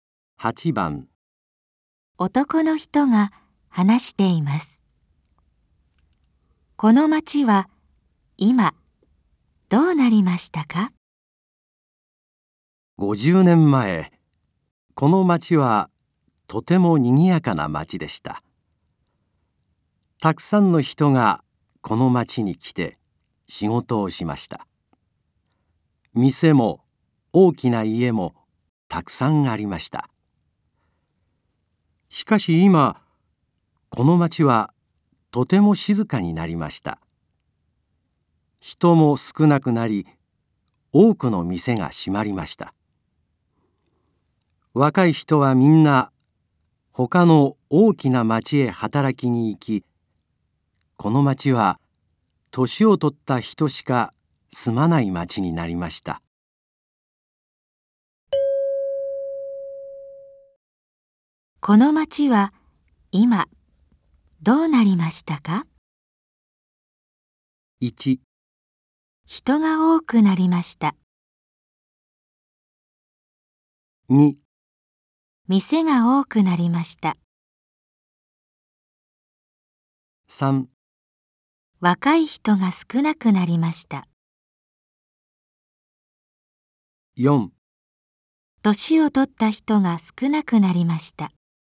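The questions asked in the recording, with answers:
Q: この町は今どうなりましたか?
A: 3: 若い人が少なくなりました。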